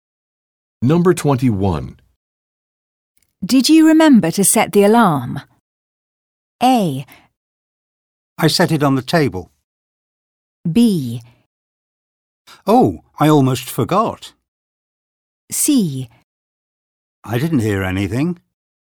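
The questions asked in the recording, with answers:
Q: Did you remember to set the alarm?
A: B: Oh, I almost forgot.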